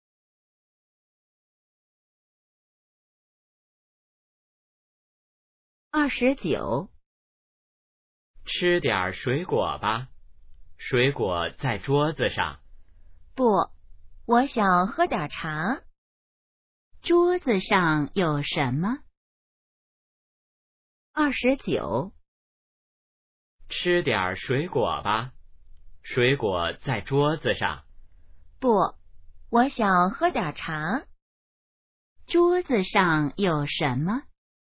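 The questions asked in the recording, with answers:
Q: 桌子上有什么?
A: 水果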